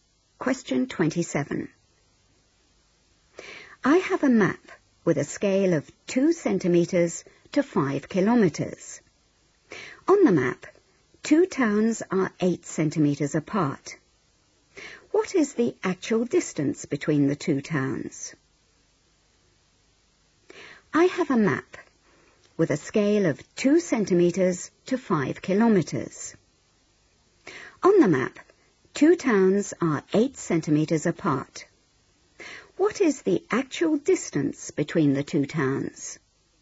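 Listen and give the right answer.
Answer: 20 km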